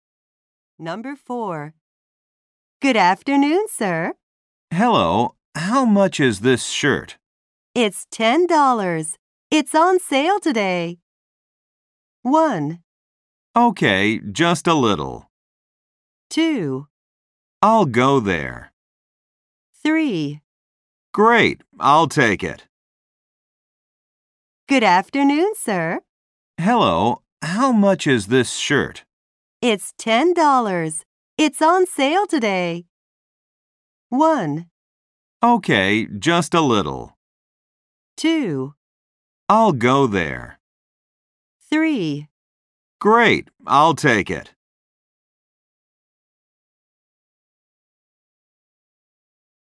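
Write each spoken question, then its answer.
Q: It's $10. It's on sale today.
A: 3: Great, I'll take it.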